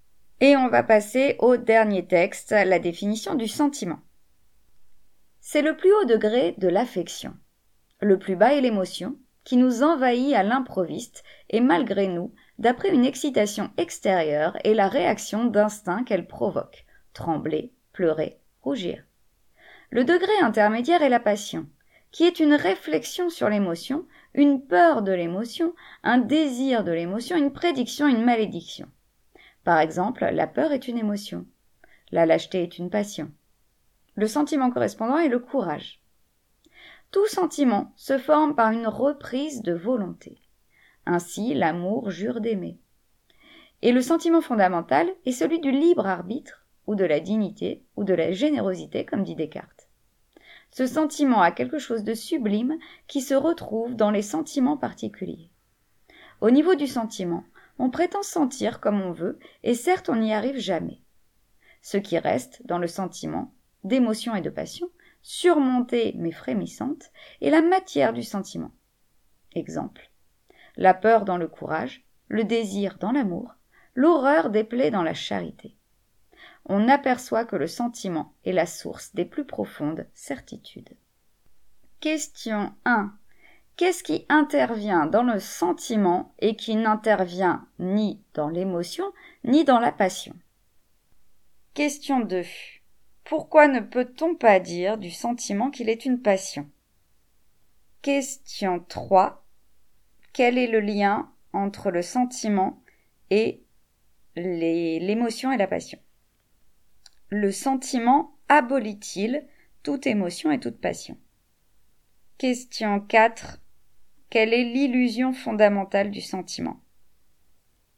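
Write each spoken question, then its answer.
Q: Qu'est-ce qui intervient dans le sentiment et qui n'intervient ni dans l'émotion ni dans la passion?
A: La volonté (une reprise de volonté)

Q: Quelle est l'illusion fondamentale du sentiment?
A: On prétend sentir comme on veut, mais on n'y arrive jamais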